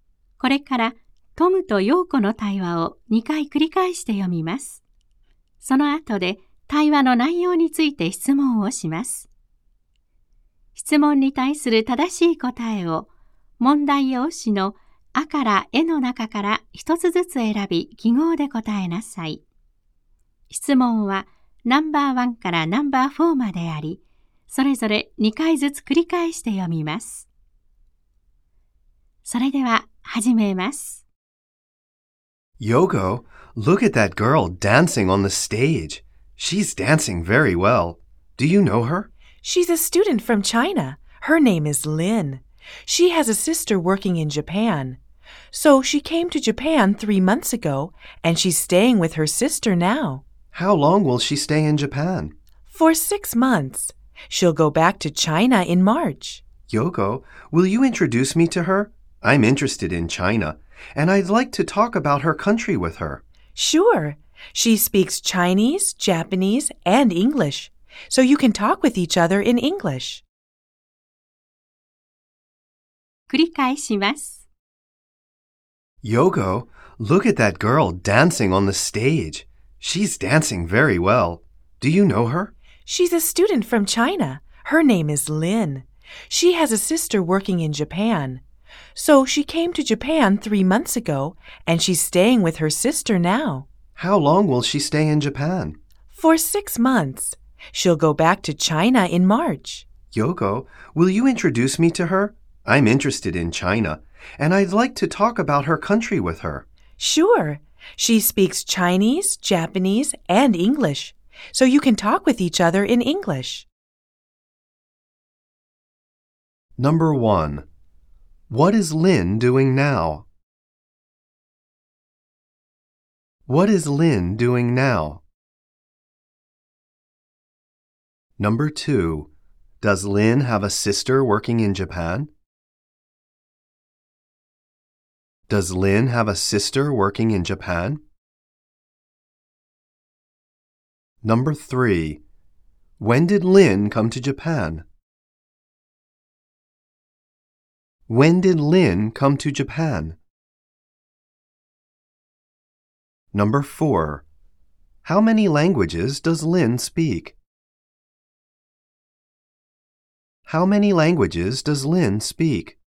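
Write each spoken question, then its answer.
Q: What is Lin doing now?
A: She is dancing on the stage.

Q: does Lin have a sister working in Japan?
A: Yes, she does.

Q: when did Lin come to Japan?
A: Three months ago.

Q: How many languages does Lin speak?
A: Three.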